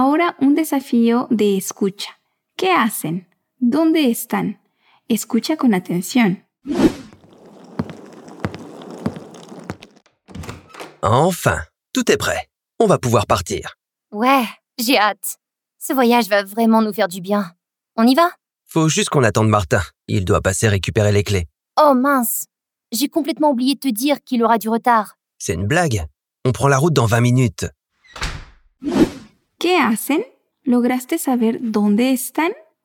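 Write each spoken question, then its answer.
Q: ¿Qué hacen?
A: Se preparan para salir de viaje y esperan a Martín, que va a recoger las llaves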